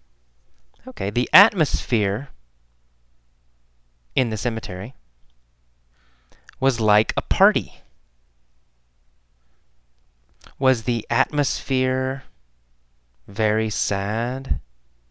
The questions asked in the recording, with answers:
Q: Was the atmosphere Very sad?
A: No, no, the atmosphere was not sad.